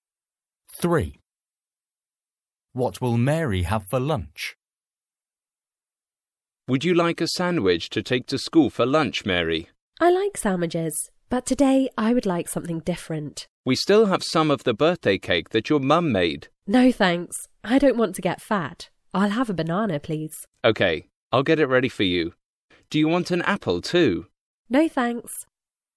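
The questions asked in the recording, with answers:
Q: What will Mary have for lunch?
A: A banana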